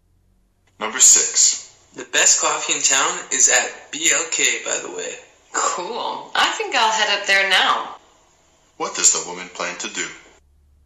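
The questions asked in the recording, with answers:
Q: What does the woman plan to do?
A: Go to BLK for coffee now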